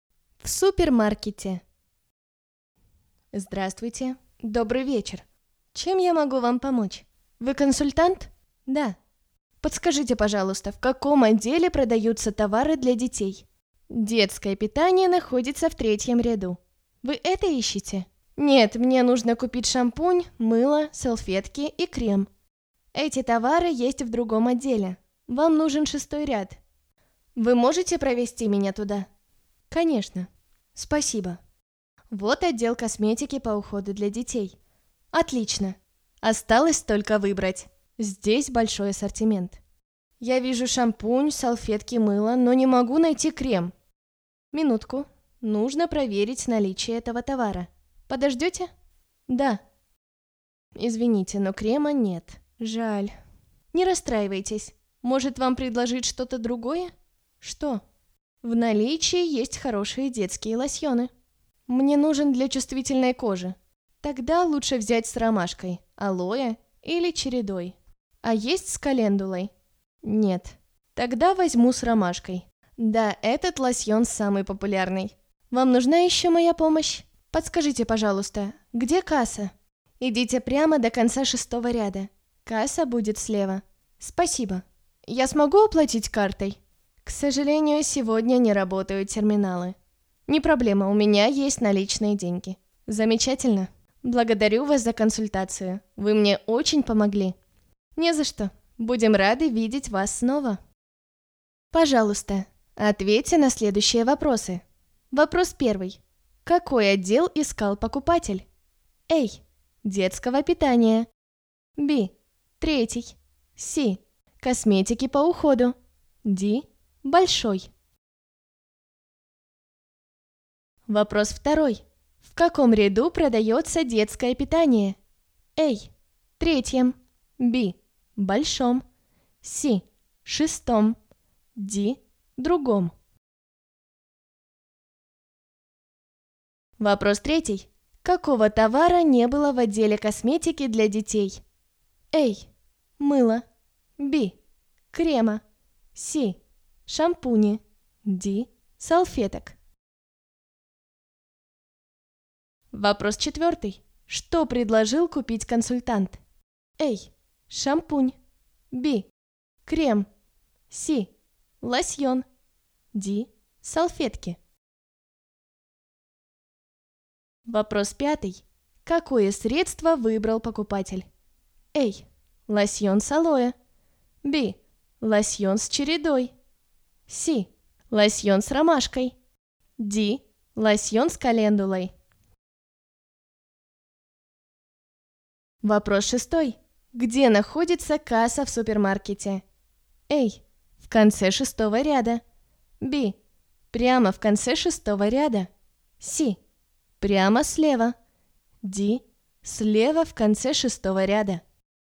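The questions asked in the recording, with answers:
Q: Какой отдел искал покупатель?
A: C: Косметики по уходу.

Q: В каком ряду продается детское питание?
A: A: Третьем.

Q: Какого товара не было в отделе косметики для детей?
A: B: Крема.

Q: Что предложил купить консультант?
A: C: Лосьон.

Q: Какое средство выбрал покупатель?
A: C: Лосьон с ромашкой.

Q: Где находится касса в супермаркете?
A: D: Слева в конце шестого ряда.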